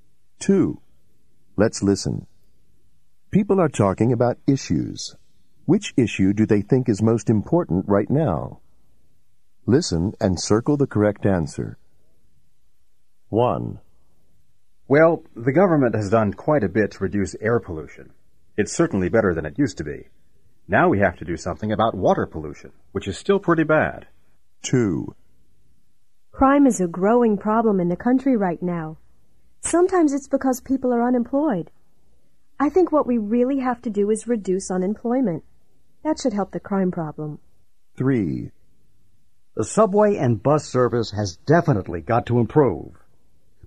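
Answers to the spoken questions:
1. water pollution
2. unemployment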